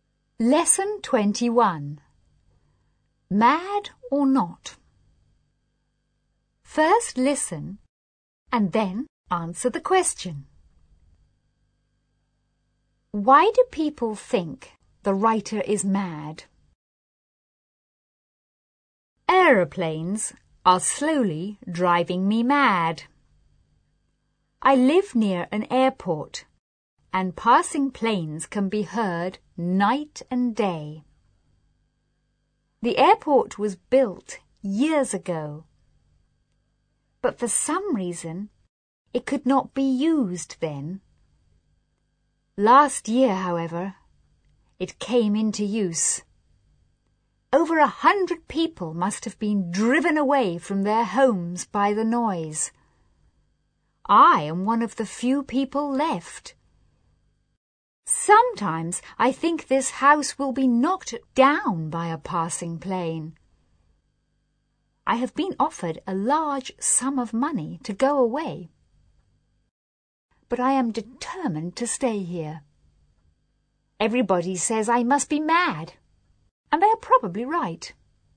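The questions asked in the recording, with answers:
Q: Why do people think the writer is mad?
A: Because he refuses to leave his noisy house near the airport, even though he has been offered a large sum of money to go away.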